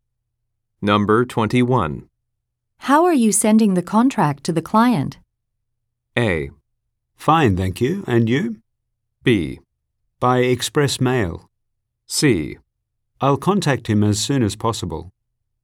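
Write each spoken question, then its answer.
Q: How are you sending the contract to the client?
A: B: By express mail.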